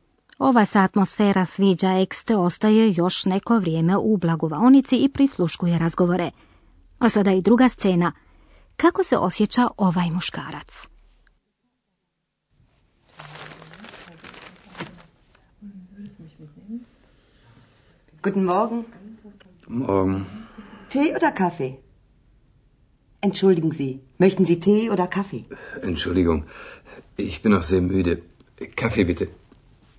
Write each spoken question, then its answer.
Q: Kako se osjeća ovaj muškarac?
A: No, ovaj je čovjek na doručak stigao prilično pospan.